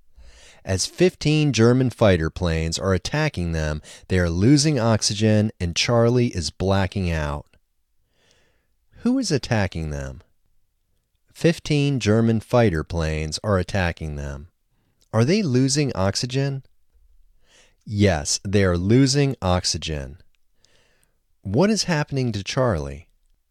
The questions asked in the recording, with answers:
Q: Who is attacking them?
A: 15 German fighter planes are attacking them.

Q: What is happening to Charlie?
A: Charlie is blacking out.